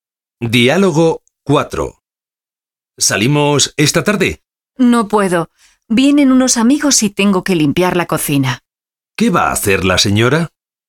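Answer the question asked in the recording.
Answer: Limpiar la cocina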